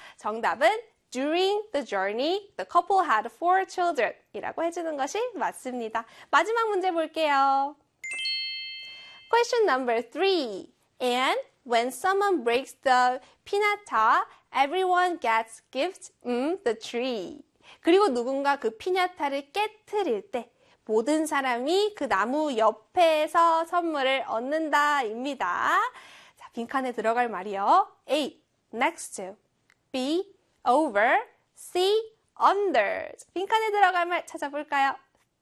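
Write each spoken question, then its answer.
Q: 빈칸에 들어갈 말 찾아볼까요?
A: A: next to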